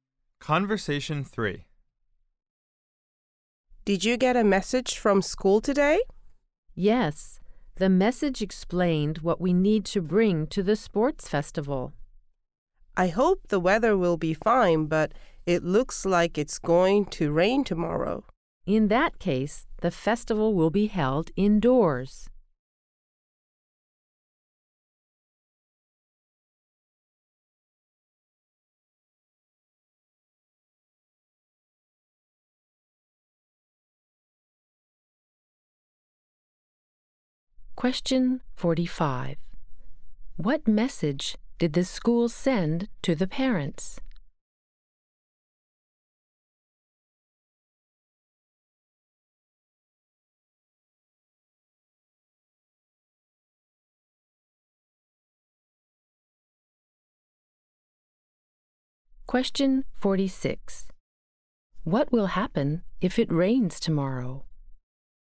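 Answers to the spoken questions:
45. What to bring to the sports festival.
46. The festival will be held indoors.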